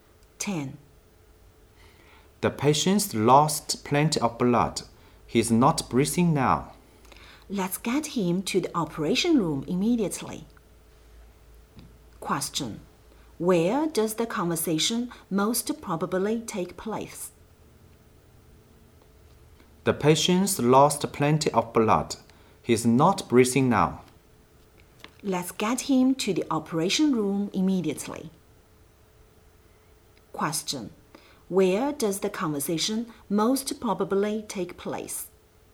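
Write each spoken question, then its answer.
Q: Where does the conversation most probably take place?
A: In a hospital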